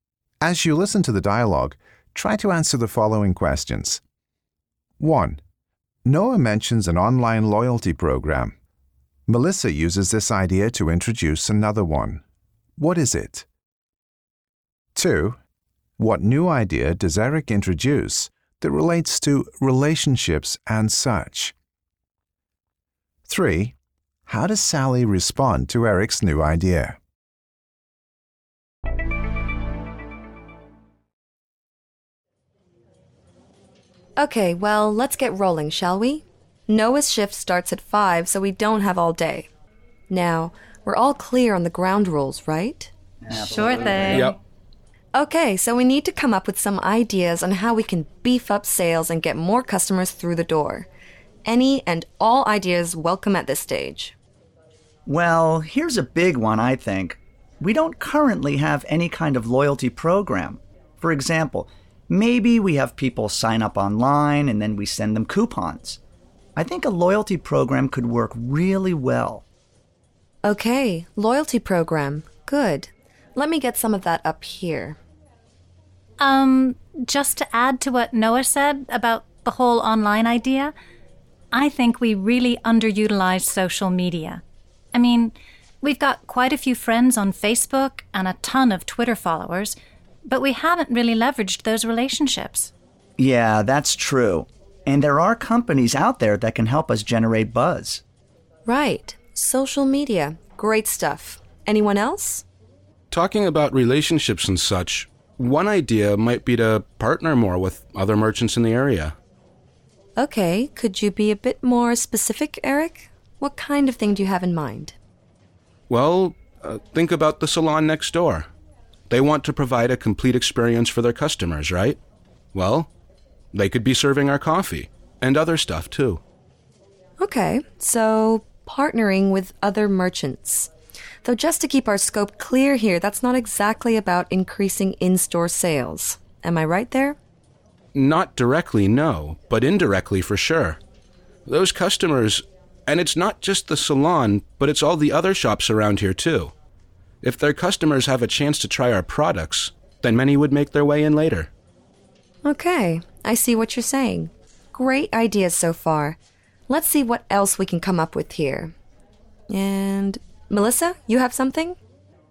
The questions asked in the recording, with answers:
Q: Noah mentions an online loyalty program. Melissa uses this idea to introduce another one. What is it?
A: Noah's idea of an online loyalty program leads Melissa to think that they should find better ways to use social media.

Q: What new idea does Eric introduce that relates to relationships and such?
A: Eric has suggested partnering with other merchants.

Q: How does Sally respond to Eric's new idea?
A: She's careful in her language, asking Eric politely if he could be a bit more specific.